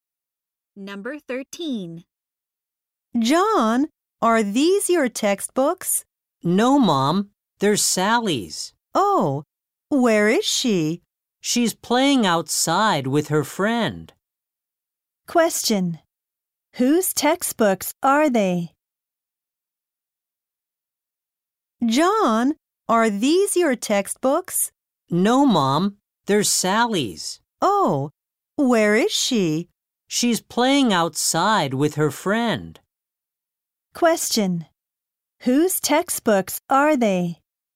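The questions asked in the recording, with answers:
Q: Question. Whose textbooks are they?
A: Sally's.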